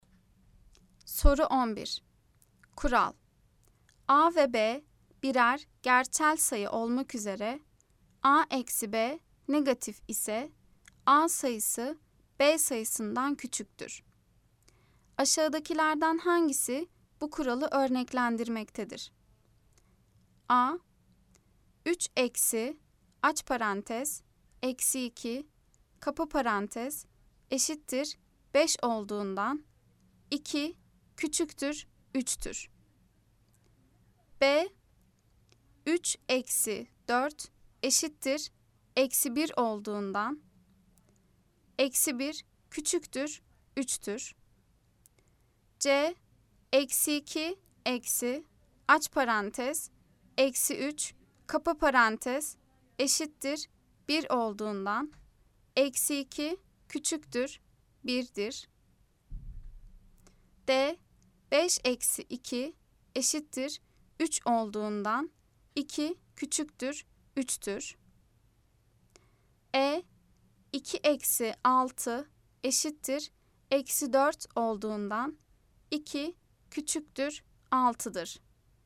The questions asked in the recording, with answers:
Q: Aşağıdakilerden hangisi bu kuralı örneklendirmektedir?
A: Cevap Edirne. 2 eksi 6 eşittir eksi 4 olduğundan 2 küçüktür 6'dır.